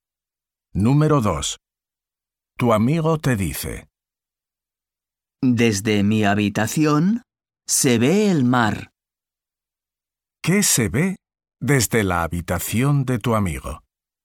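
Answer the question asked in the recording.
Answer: El mar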